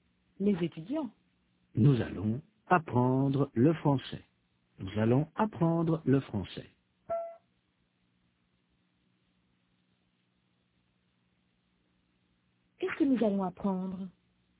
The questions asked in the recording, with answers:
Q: Qu'est-ce que nous allons apprendre?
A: Le français.